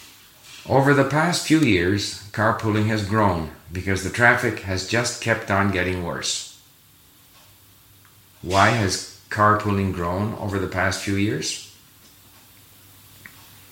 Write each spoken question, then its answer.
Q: Why has carpooling grown over the past few years?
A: It's grown because the traffic has just kept on getting worse.